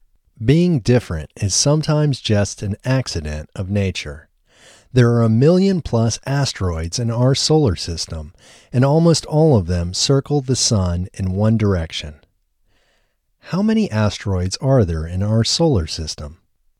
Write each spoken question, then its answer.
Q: How many asteroids are there in our solar system?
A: There are a million plus asteroids in our solar system.